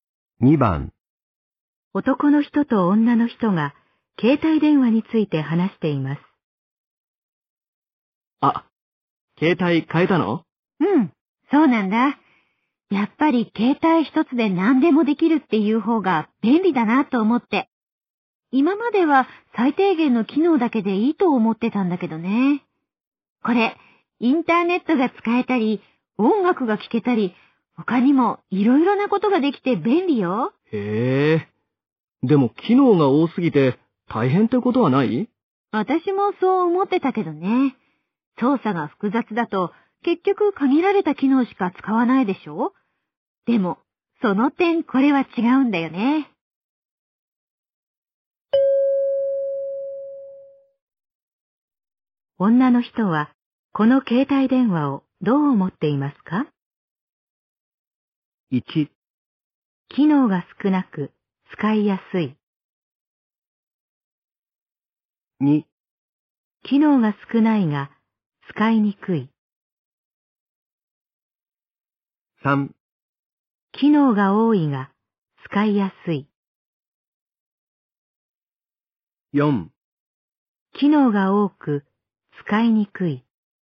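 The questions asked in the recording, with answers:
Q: 女の人は、この携帯電話をどう思っていますか?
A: 3: 機能が多いが、使いやすい。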